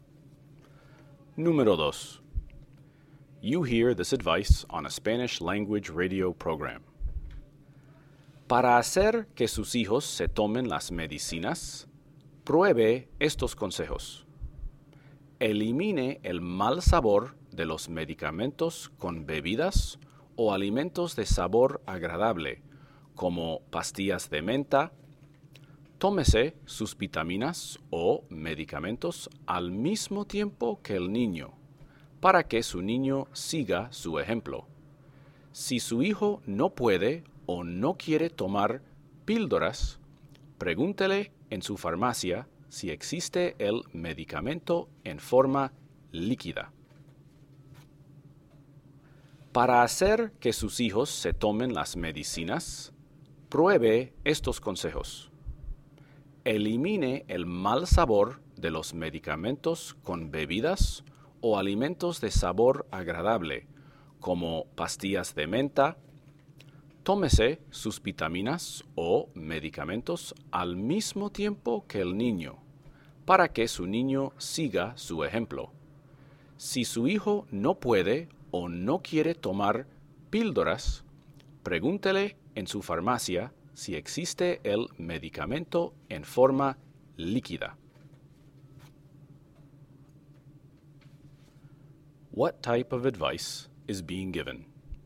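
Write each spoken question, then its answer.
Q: What type of advice is being given?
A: How to get children to take their medicine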